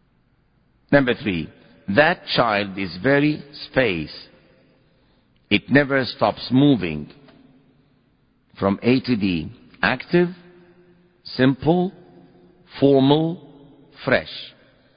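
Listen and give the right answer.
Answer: A: active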